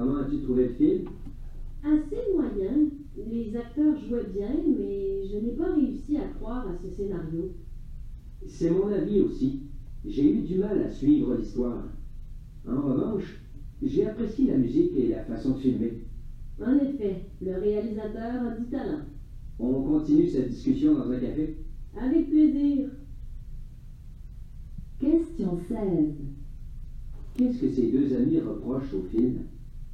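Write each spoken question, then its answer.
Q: Qu'est-ce que ces deux amis reprochent au film?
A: Le scénario : l'histoire est peu crédible et difficile à suivre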